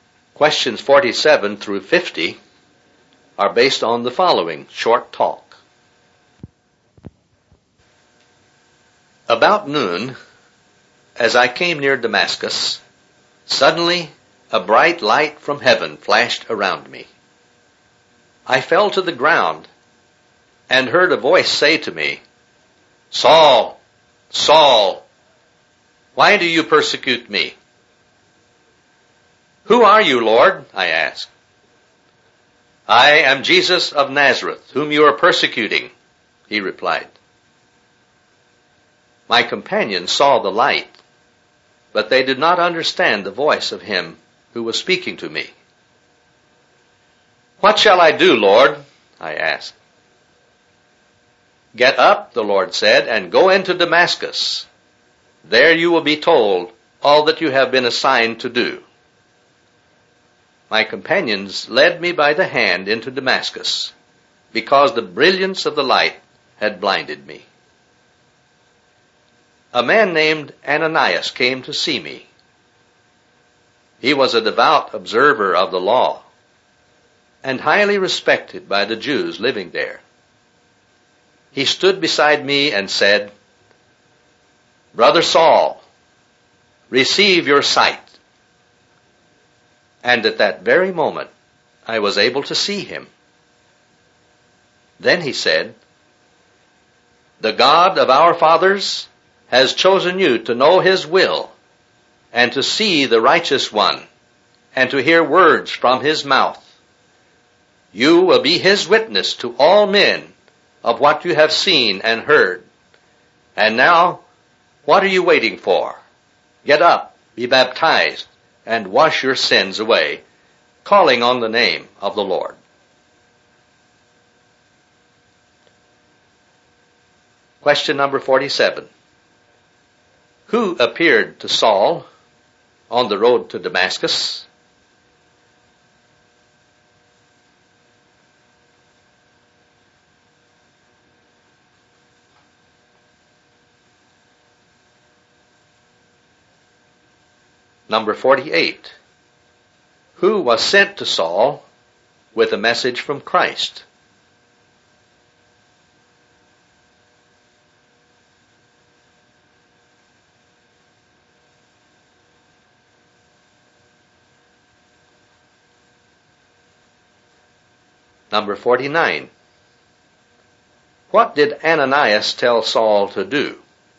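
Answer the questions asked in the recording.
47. Jesus of Nazareth
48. Ananias
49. Get up, be baptized and wash his sins away, calling on the name of the Lord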